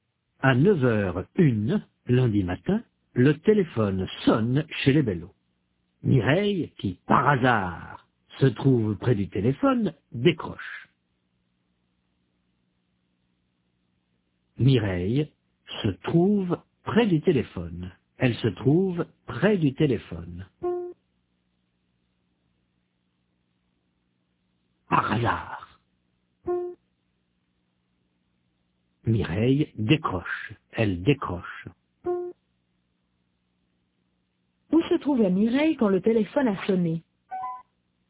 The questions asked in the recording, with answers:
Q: Où se trouvait Mireille quand le téléphone a sonné?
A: Près du téléphone.